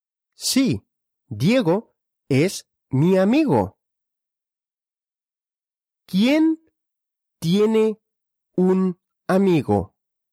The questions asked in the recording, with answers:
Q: ¿Quién tiene un amigo?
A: Yo, yo tengo un amigo.